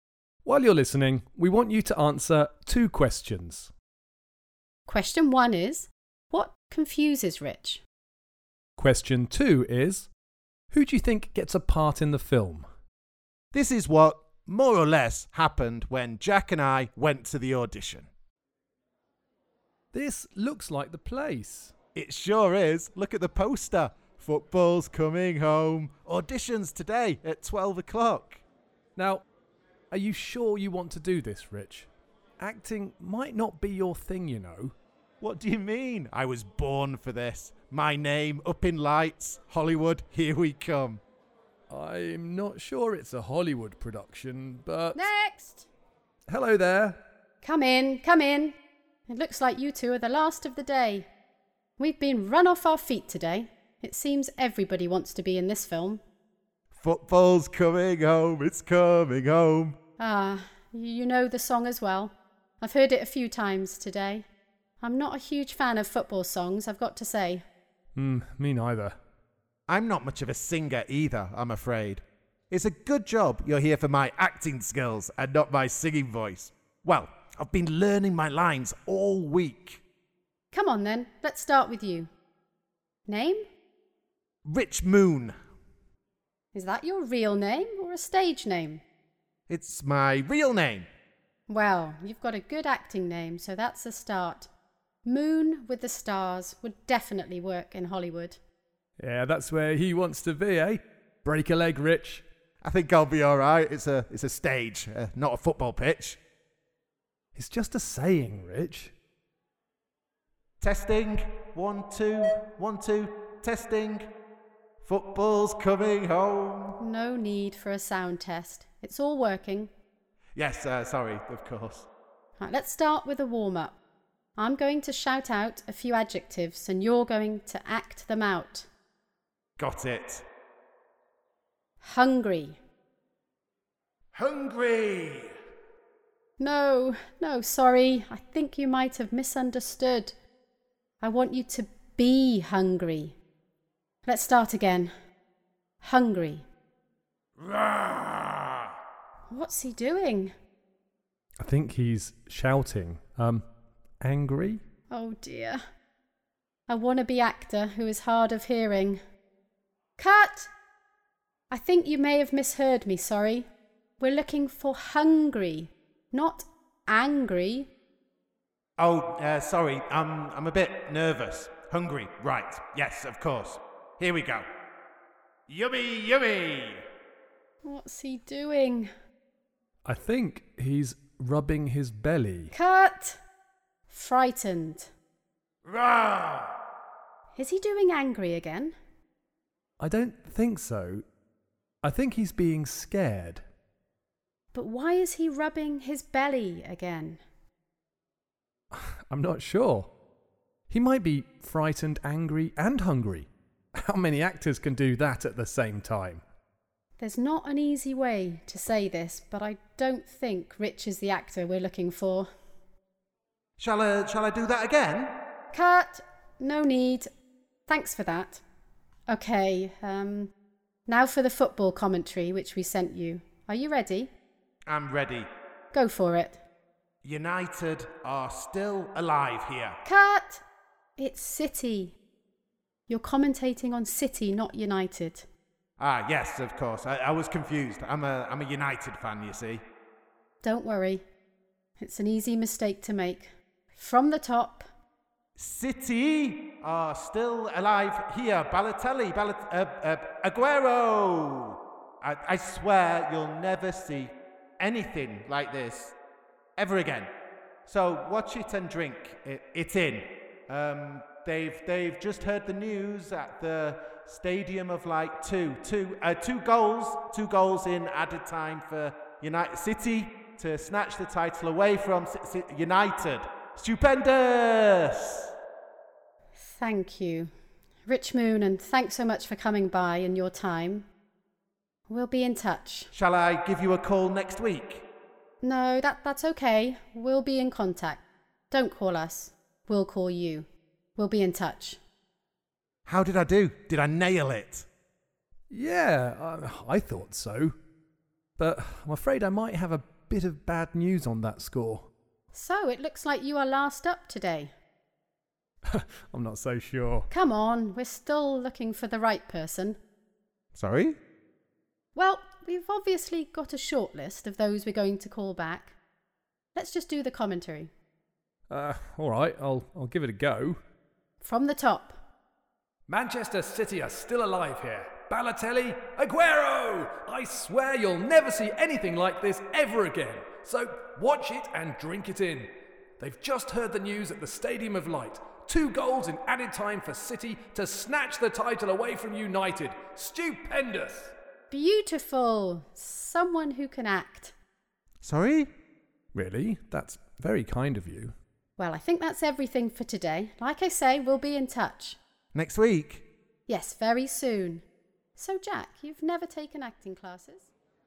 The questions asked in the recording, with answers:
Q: who do you think gets a part in the film?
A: Well, definitely not me. Jack was much better.